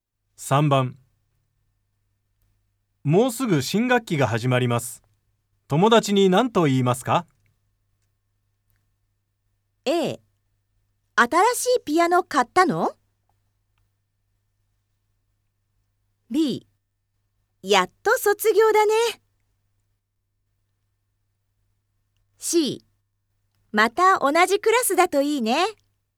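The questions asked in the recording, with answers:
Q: もうすぐ新学期が始まります。友達に何と言いますか?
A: C: また同じクラスだといいね。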